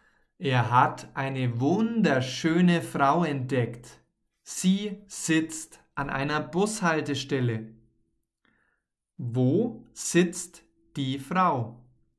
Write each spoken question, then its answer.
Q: Wo sitzt die Frau.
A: An einer Bushaltestelle. Die Frau sitzt an einer Bushaltestelle.